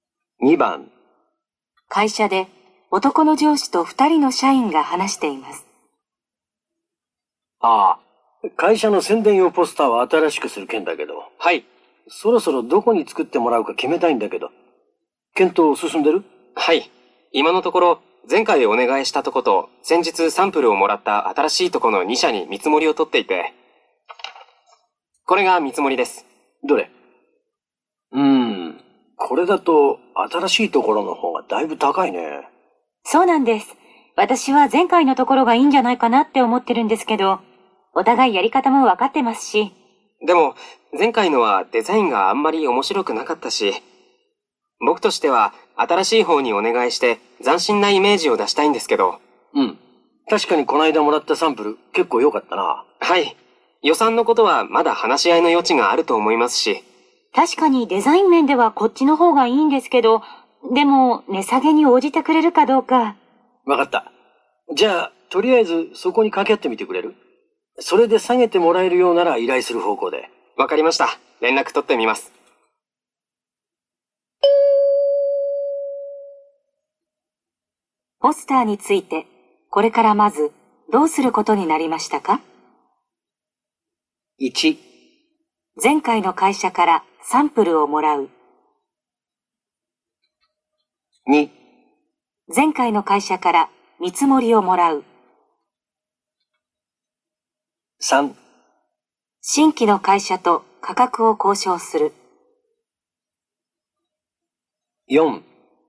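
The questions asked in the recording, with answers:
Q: ポスターについて、これからまず、どうすることになりましたか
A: 3: 新規の会社と価格を交渉する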